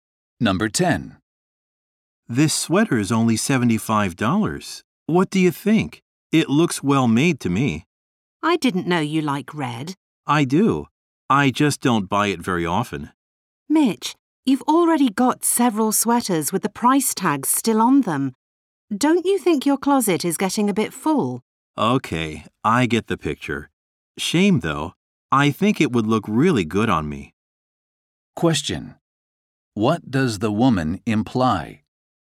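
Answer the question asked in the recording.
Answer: Mitch shouldn't buy another sweater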